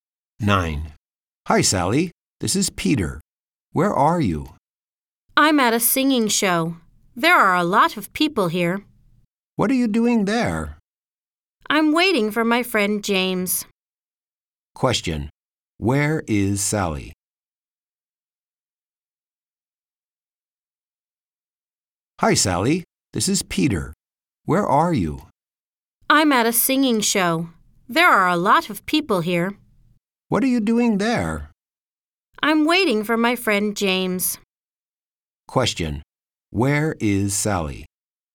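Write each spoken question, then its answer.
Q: Where is Sally?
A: At a singing show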